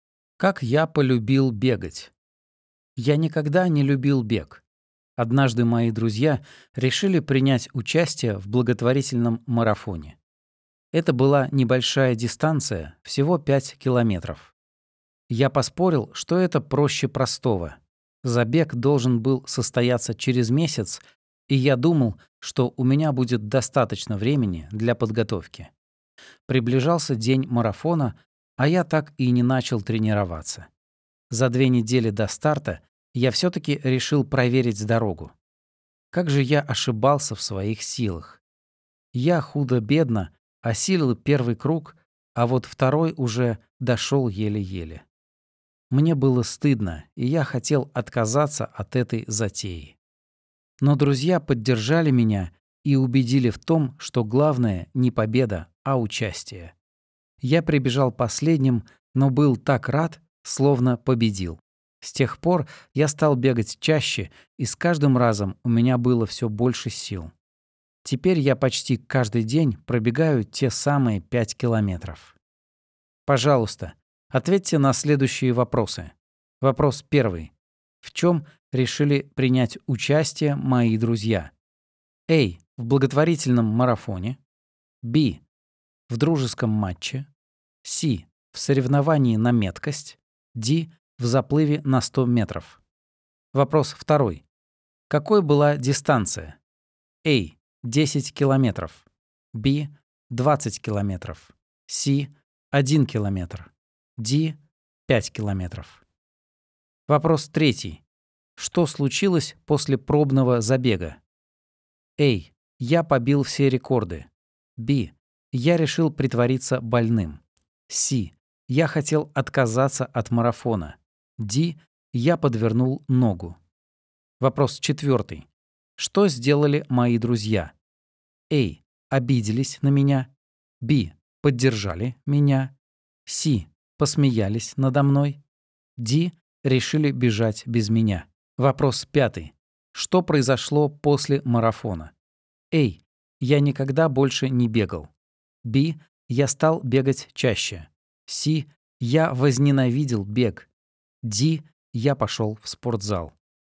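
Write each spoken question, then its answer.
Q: В чем решили принять участие мои друзья?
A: A: В благотворительном марафоне.

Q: Какой была дистанция?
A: D: 5 километров.

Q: Что случилось после пробного забега?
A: C: Я хотел отказаться от марафона.

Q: Что сделали мои друзья?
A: B: Поддержали меня.

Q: Что произошло после марафона?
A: B: Я стал бегать чаще.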